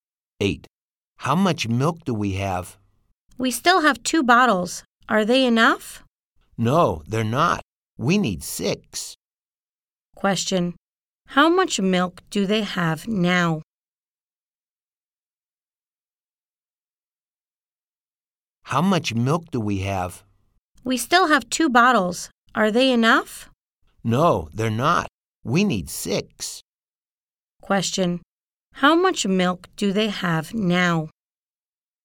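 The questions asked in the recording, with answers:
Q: Question, how much milk do they have now?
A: Two bottles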